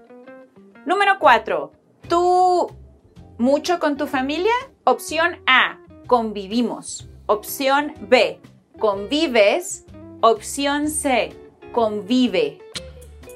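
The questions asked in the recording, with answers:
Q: ¿Tú mucho con tu familia? Opción A. Convivimos. Opción B. Convives. Opción C. Convive.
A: B: Convives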